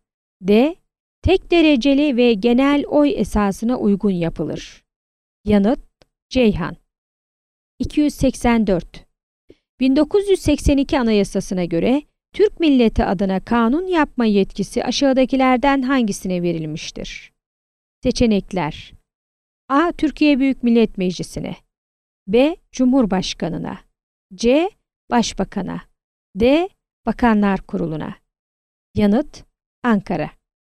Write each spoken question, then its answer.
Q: 1982 Anayasası'na göre Türk milleti adına kanun yapma yetkisi aşağıdakilerden hangisine verilmiştir?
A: Yanıt: Ankara.